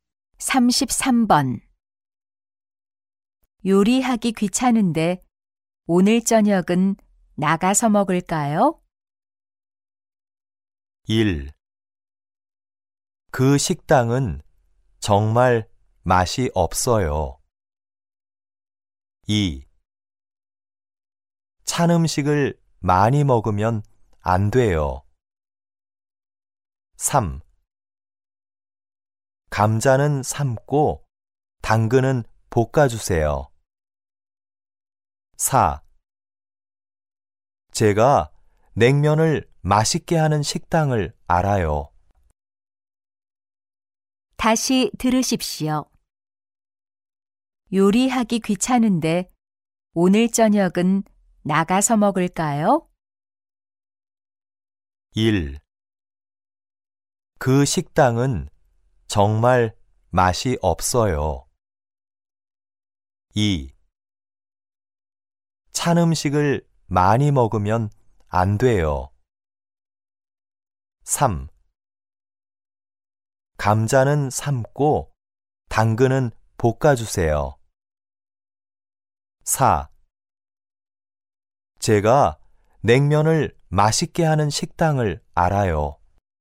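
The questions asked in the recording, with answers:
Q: 요리하기 귀찮은데 오늘 저녁은 나가서 먹을까요?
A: 4: 제가 냉면을 맛있게 하는 식당을 알아요.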